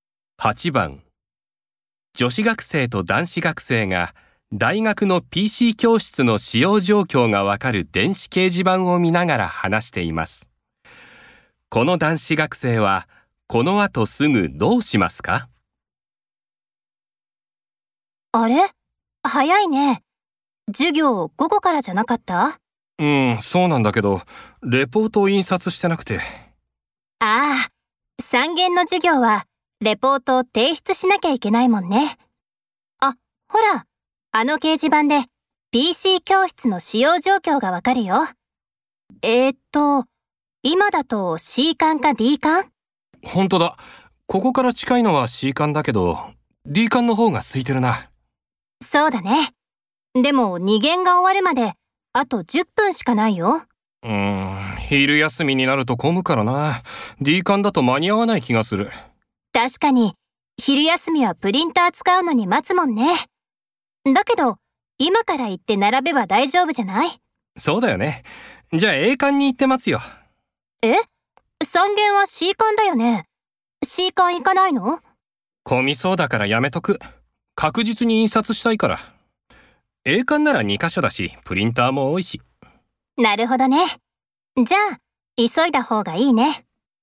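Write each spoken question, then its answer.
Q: この男子学生はこの後すぐどうしますか?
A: A館に行ってレポートを印刷する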